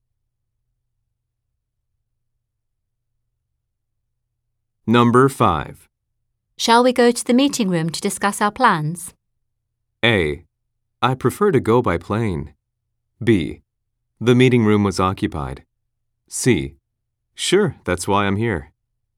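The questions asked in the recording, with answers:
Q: Shall we go to the meeting room to discuss our plans?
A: C: Sure, that's why I'm here.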